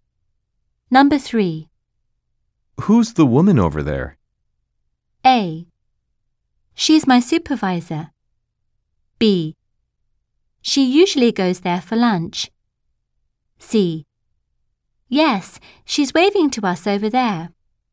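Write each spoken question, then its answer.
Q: Who's the woman over there?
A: A: She's my supervisor.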